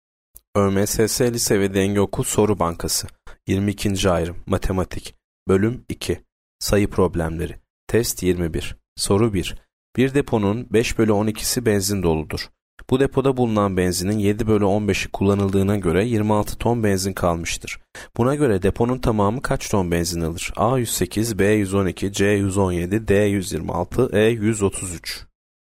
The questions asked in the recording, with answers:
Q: Buna göre deponun tamamı kaç ton benzin alır?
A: Yanıt C 117.